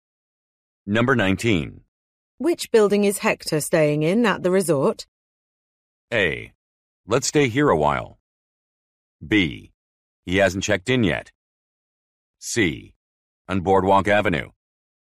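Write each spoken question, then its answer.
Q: Which building is Hector staying in at the resort?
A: B: He hasn't checked in yet.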